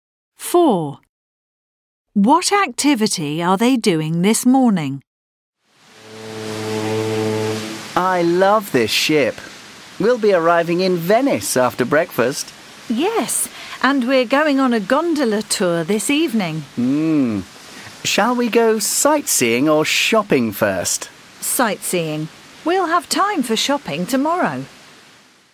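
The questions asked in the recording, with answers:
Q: What activity are they doing this morning?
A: Sightseeing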